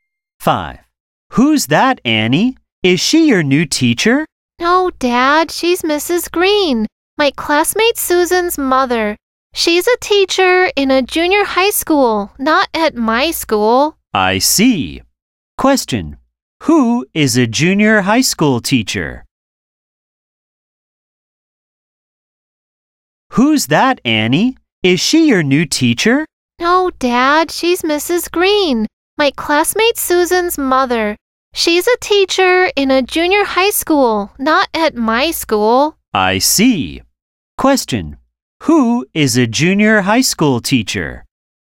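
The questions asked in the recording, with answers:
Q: Who is a junior high school teacher?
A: Mrs. Green, Susan's mother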